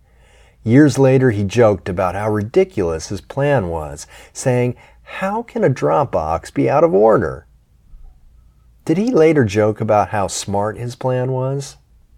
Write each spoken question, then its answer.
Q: Did he later joke about how smart his plan was?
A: No, he didn't joke about how smart his plan was.